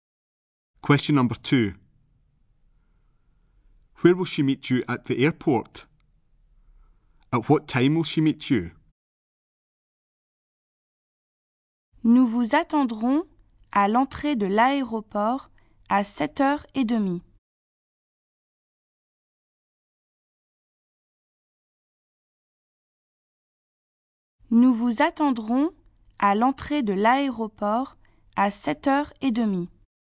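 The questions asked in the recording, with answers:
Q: Where will she meet you at the airport?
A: At the airport entrance

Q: At what time will she meet you?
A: 7:30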